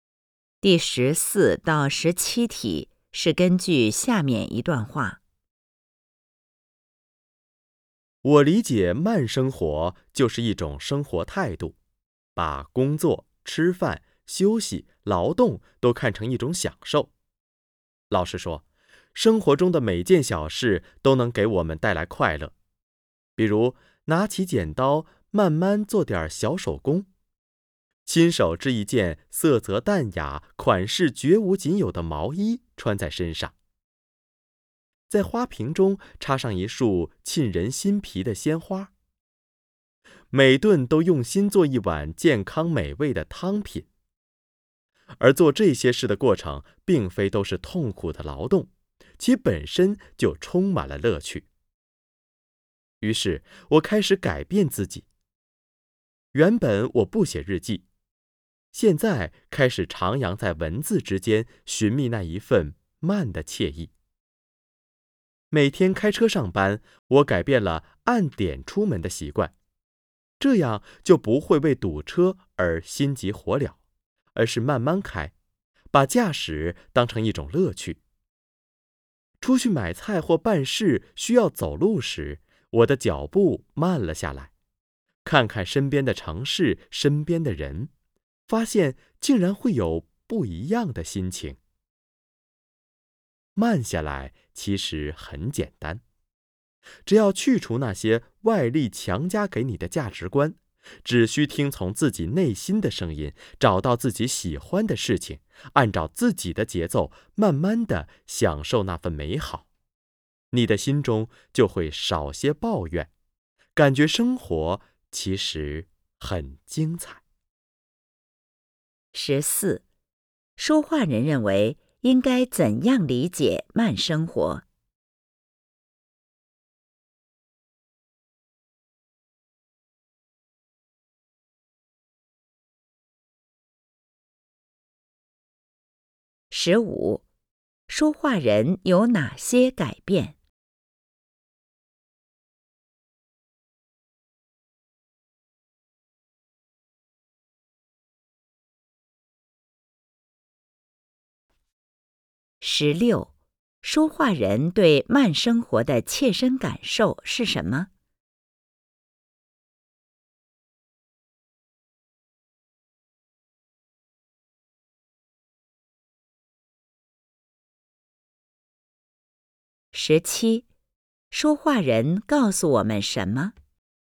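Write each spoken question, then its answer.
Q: 说话人认为应该怎样理解慢生活?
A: 一种生活态度,把工作、吃饭、休息、劳动都看成享受

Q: 说话人有哪些改变?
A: 开始写日记,不再按点出门、慢慢开车,走路慢下来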